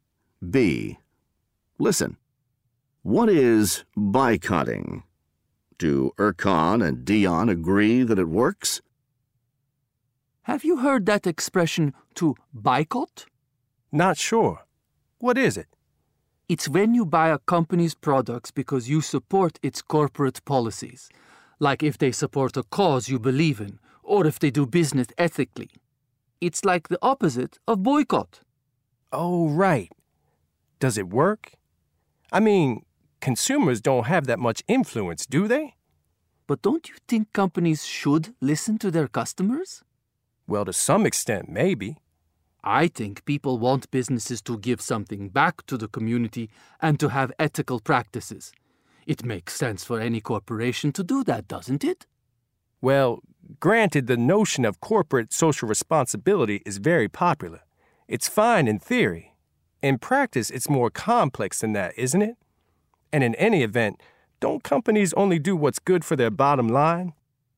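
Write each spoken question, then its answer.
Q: Do Erkan and Dion agree that it works?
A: No, they don't agree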